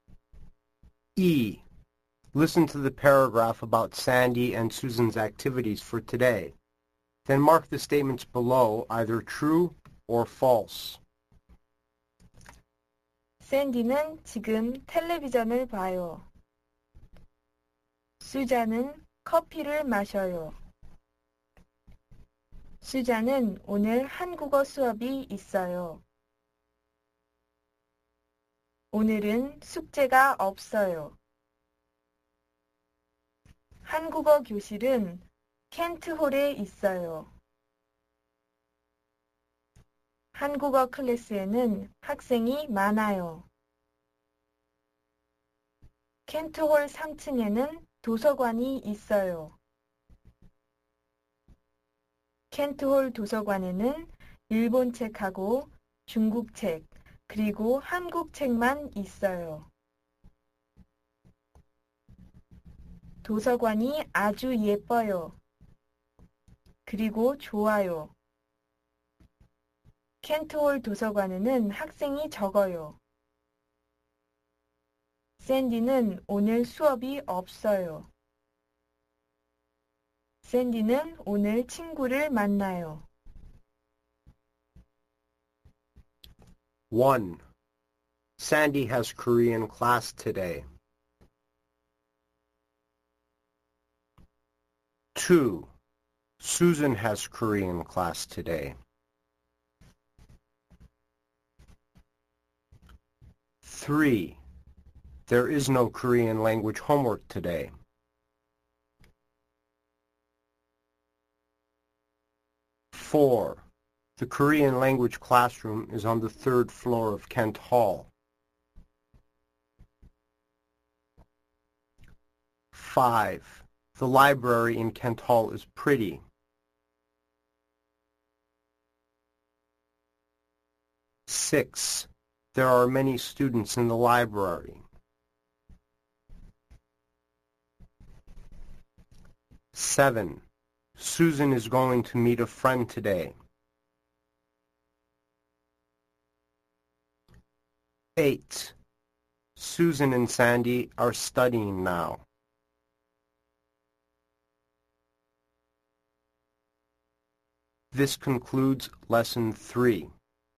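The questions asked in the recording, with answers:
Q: Sandy has Korean class today.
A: False

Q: Susan has Korean class today.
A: True

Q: There is no Korean language homework today.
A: True

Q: The Korean language classroom is on the third floor of Kent Hall.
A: False

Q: The library in Kent Hall is pretty.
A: True

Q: There are many students in the library.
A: False

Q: Susan is going to meet a friend today.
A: False

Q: Susan and Sandy are studying now.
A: False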